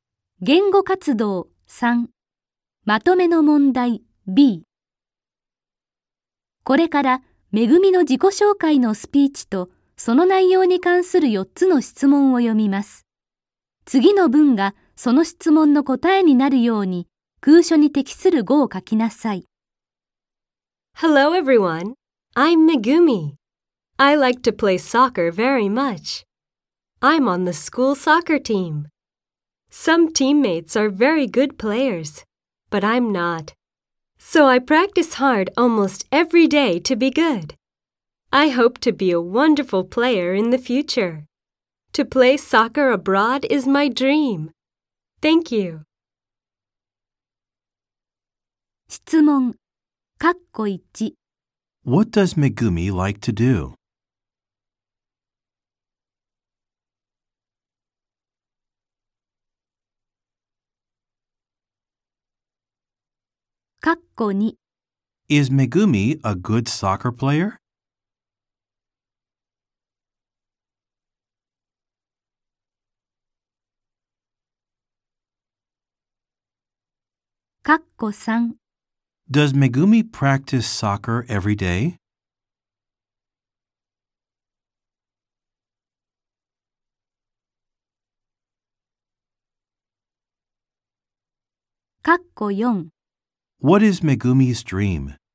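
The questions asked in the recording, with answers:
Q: What does Megumi like to do?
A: She likes to play soccer.

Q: Is Megumi a good soccer player?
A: No, she isn't.

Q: Does Megumi practice soccer every day?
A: No, she practices almost every day.

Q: What is Megumi's dream?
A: To play soccer abroad.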